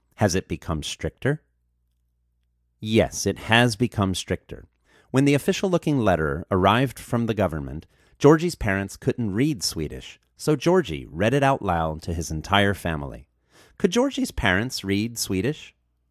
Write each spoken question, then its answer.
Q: Could Georgie's parents read Swedish?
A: No, Georgie's parents couldn't read Swedish.